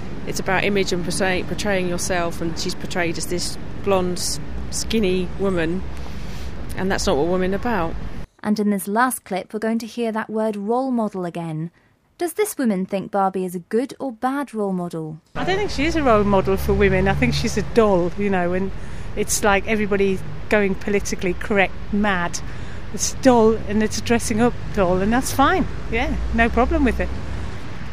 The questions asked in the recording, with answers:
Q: Does this woman think Barbie is a good or bad role model?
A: Well, she doesn't think that Barbie's a role model at all.